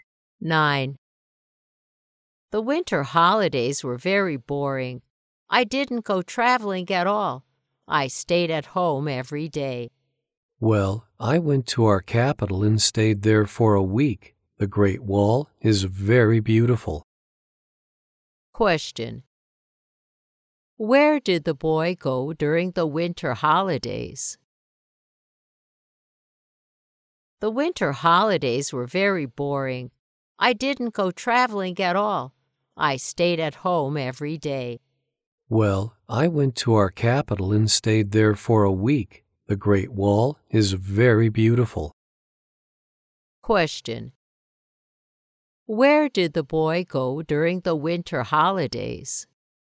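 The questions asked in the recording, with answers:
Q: Where did the boy go during the winter holidays?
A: The capital (Beijing)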